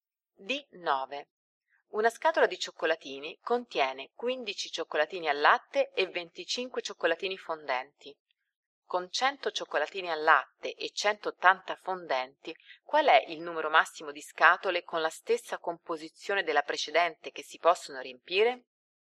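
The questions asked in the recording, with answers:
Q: Con 100 cioccolatini al latte e 180 fondenti, qual è il numero massimo di scatole con la stessa composizione della precedente che si possono riempire?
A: A: 6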